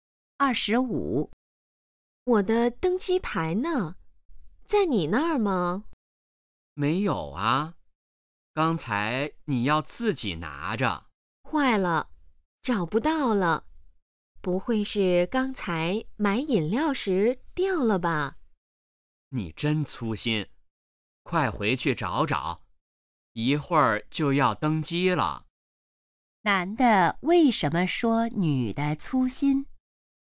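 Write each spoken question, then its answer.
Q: 男的为什么说女的粗心?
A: 她把登机牌弄丢了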